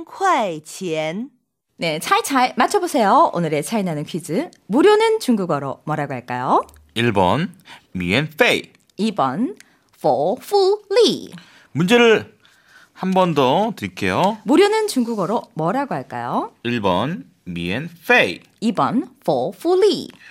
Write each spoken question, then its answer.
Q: 무료는 중국어로 뭐라고 할까요?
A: 1번 미엔페이.